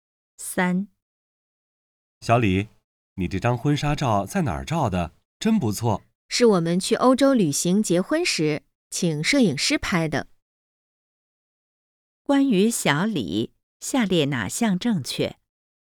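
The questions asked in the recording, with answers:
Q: 关于小李,下列哪项正确?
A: 他在欧洲旅行结婚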